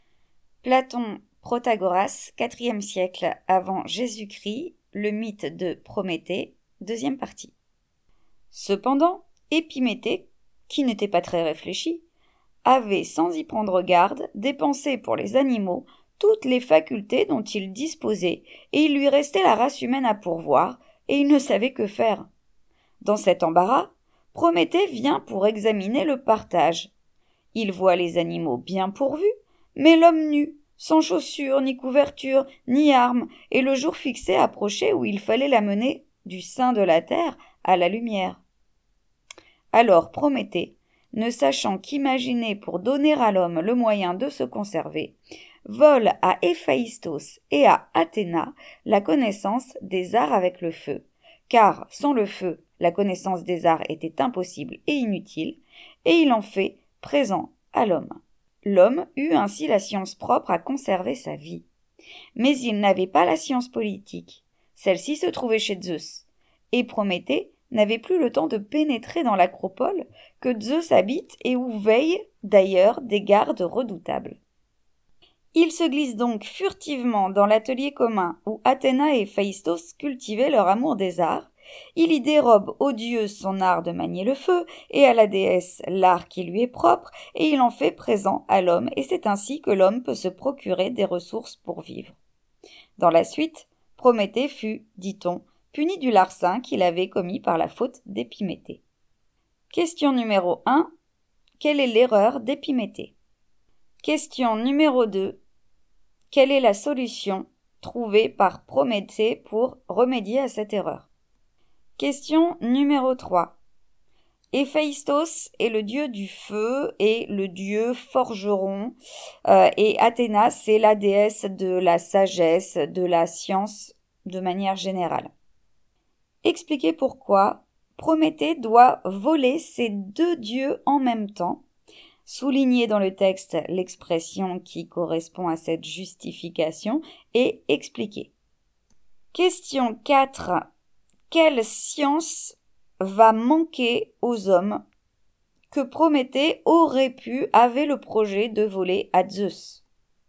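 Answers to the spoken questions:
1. Il a dépensé pour les animaux toutes les facultés, sans rien laisser pour la race humaine
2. Il vole à Héphaïstos et à Athéna la connaissance des arts avec le feu et en fait présent à l'homme
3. Car sans le feu, la connaissance des arts était impossible et inutile
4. La science politique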